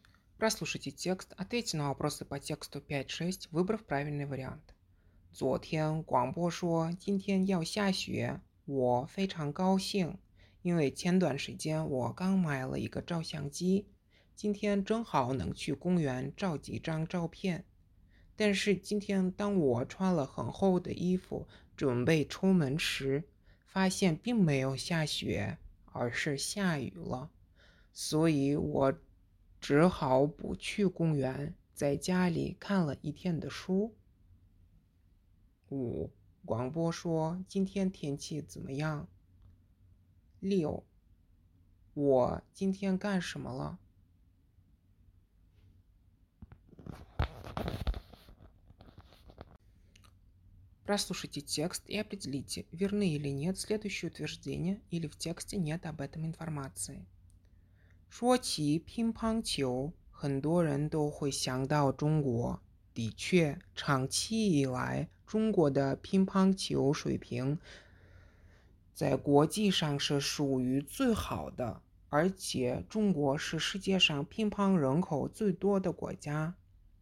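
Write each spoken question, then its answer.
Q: 广播说今天天气怎么样?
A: 要下雪

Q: 我今天干什么了?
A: 在家里看了一天的书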